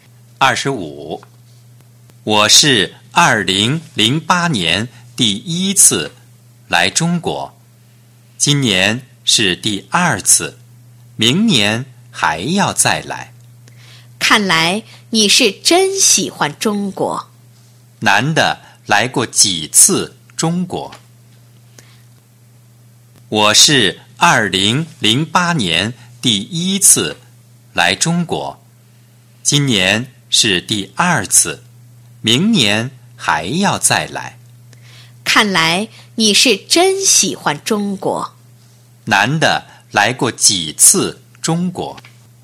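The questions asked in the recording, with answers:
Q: 男的来过几次中国?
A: 两次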